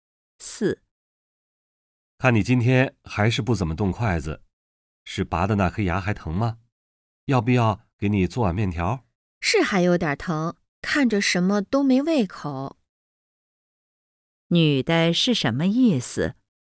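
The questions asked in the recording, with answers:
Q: 女的是什么意思?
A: 牙还有点疼,没胃口,什么都不想吃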